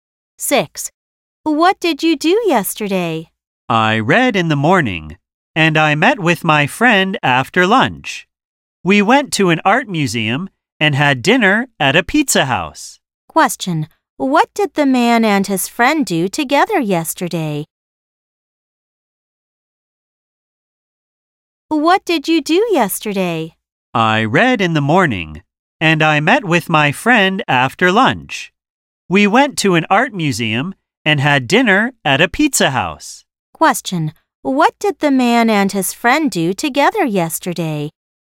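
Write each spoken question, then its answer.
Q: Question: what did the man and his friend do together yesterday?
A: Went to an art museum and had dinner at a pizza house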